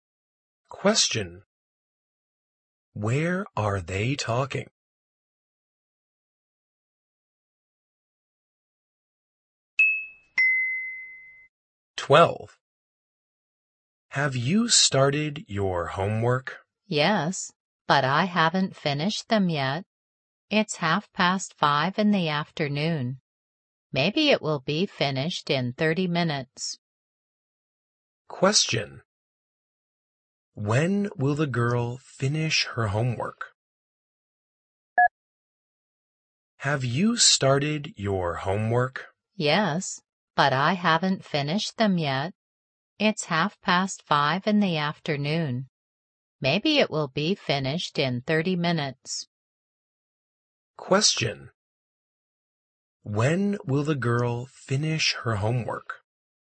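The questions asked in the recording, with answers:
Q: When will the girl finish her homework?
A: At 6:00 in the afternoon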